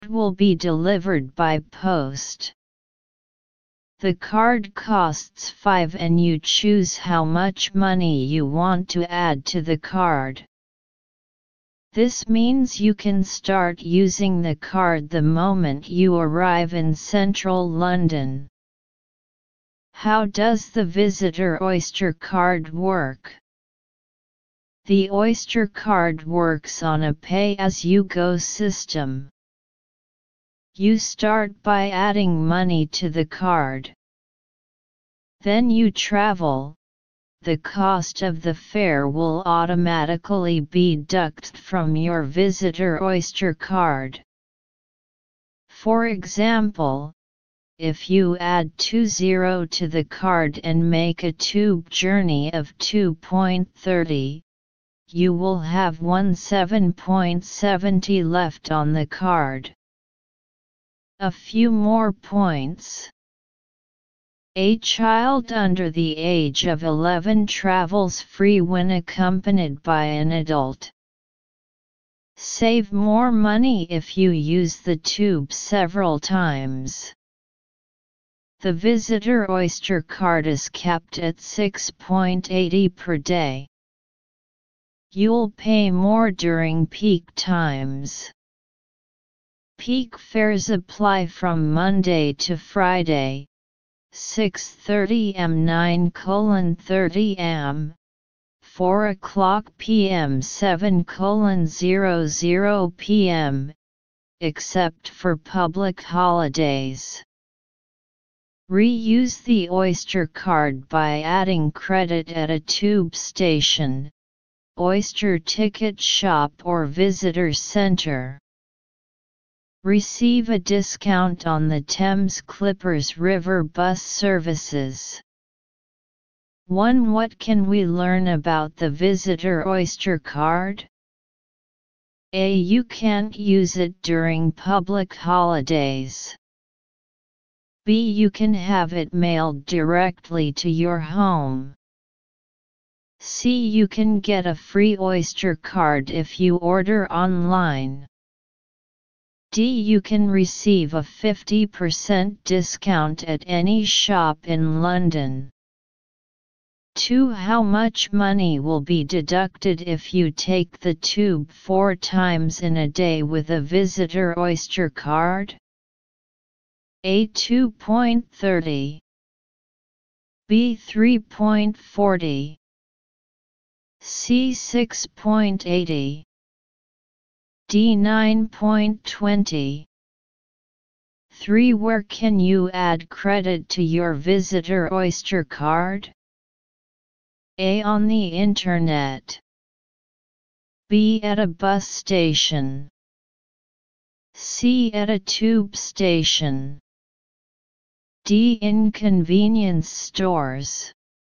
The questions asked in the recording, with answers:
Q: What can we learn about the visitor Oyster card?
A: 1. B.

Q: How much money will be deducted if you take the tube 4 times in a day with a visitor Oyster card?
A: 2. C.

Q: Where can you add credit to your visitor Oyster card?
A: 3. C.